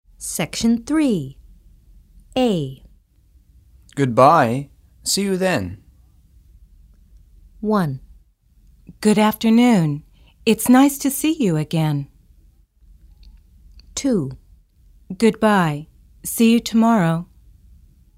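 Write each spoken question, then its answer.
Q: Goodbye. See you then.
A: 2: Goodbye. See you tomorrow.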